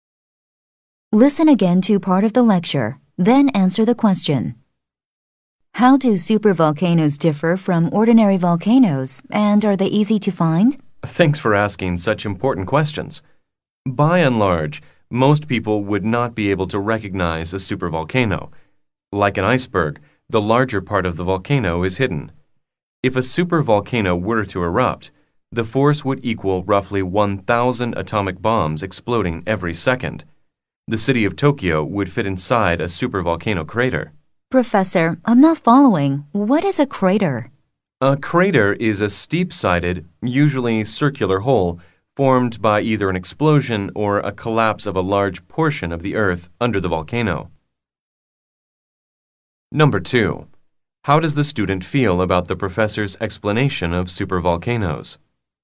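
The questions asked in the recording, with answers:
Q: How does the student feel about the professor's explanation of supervolcanoes?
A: Confused; the student doesn't understand the term "crater"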